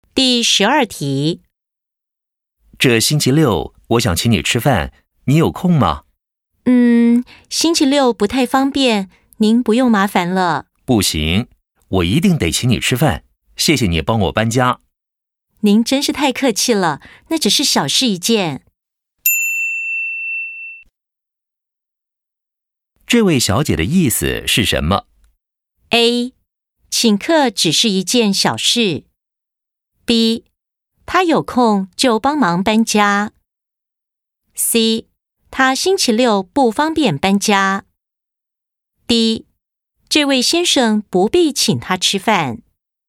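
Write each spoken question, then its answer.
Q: 这位小姐的意思是什么?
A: D: 这位先生不必请她吃饭。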